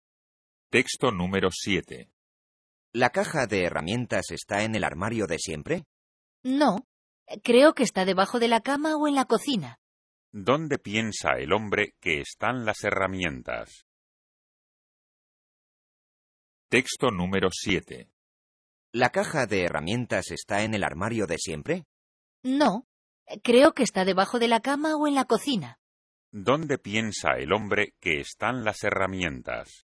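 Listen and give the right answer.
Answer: Debajo de la cama o en la cocina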